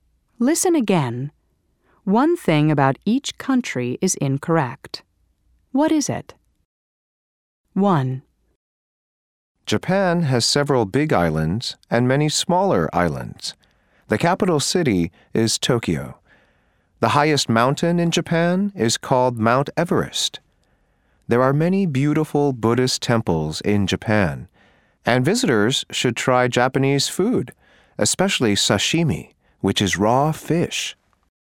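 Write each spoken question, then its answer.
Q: What is it?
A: The highest mountain in Japan is not Mount Everest (it is Mount Fuji).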